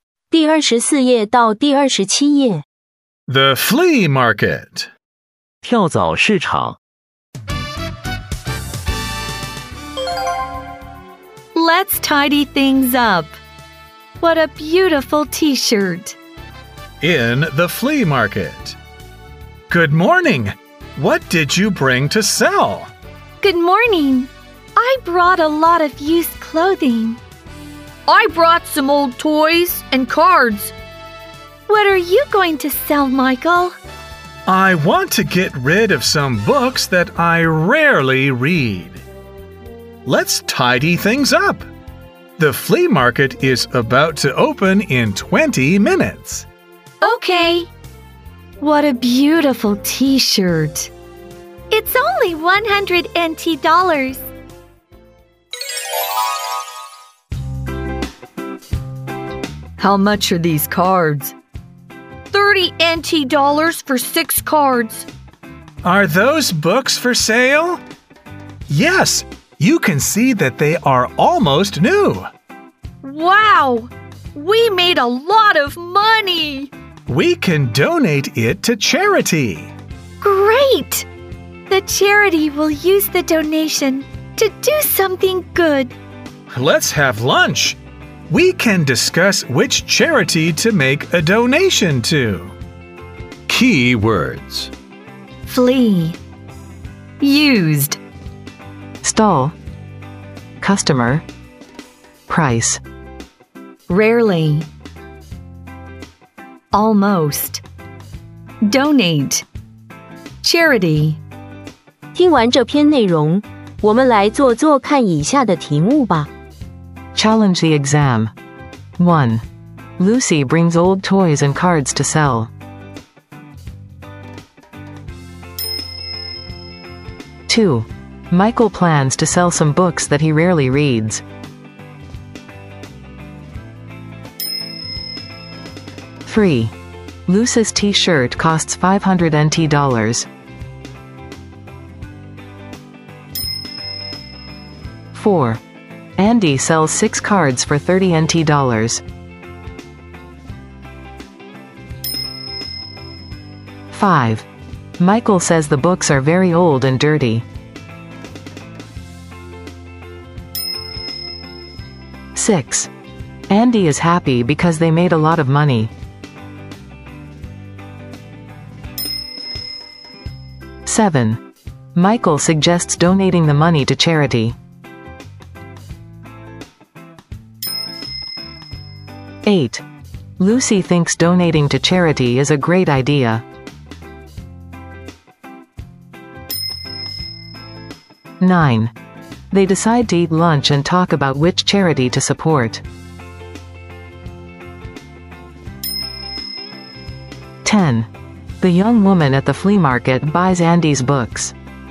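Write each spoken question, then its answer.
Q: Michael plans to sell some books that he rarely reads.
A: True

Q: Lucy's t-shirt costs 500 NT dollars.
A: False

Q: Michael says the books are very old and dirty.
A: False

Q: They decide to eat lunch and talk about which charity to support.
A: True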